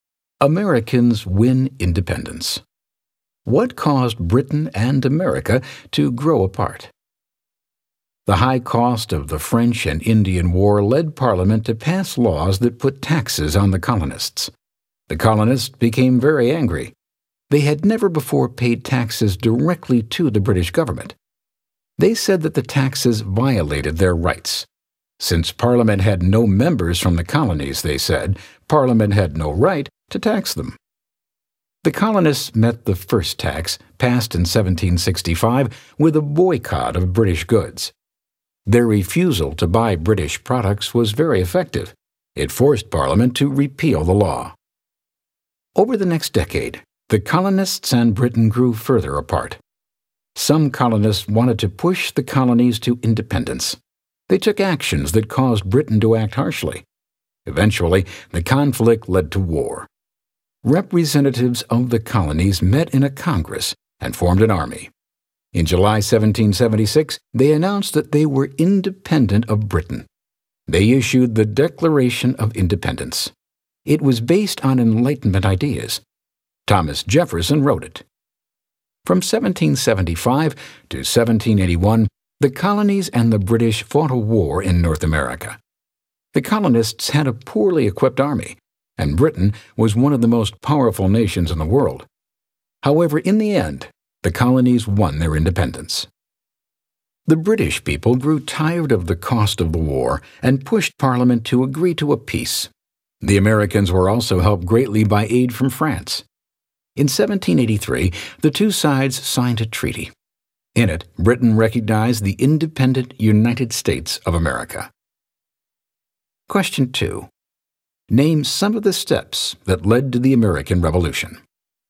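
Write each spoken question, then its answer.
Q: Name some of the steps that led to the American Revolution.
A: Taxes to pay for the French and Indian War, the colonists' anger and boycott of British goods, growing conflict and harsh British actions, a Congress that formed an army, and the Declaration of Independence.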